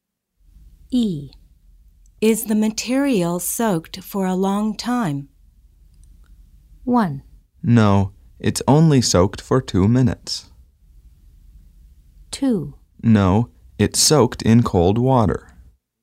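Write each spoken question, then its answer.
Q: Is the material soaked for a long time?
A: 1: No, it's only soaked for 2 minutes.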